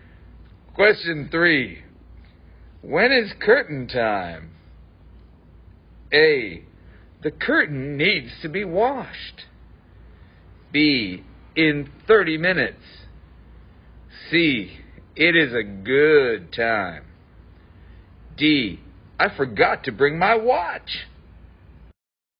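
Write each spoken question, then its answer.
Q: When is curtain time?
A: B: In 30 minutes.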